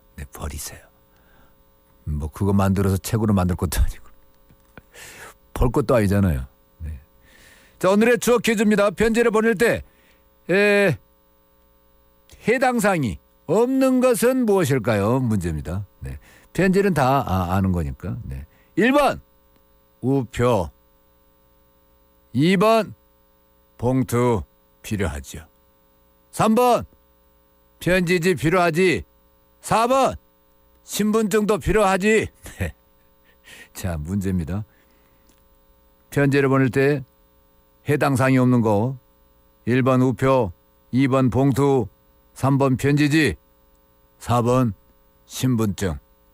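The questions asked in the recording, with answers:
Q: 편지를 보낼 때 해당 사항이 없는 거.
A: 4: 신분증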